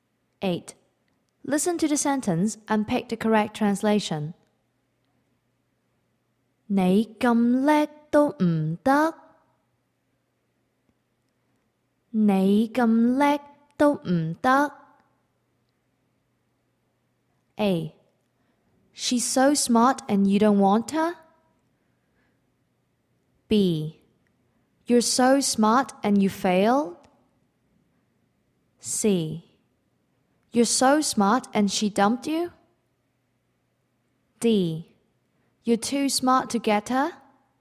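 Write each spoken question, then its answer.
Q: Listen to the sentence and pick the correct translation.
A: B: You're so smart and you failed?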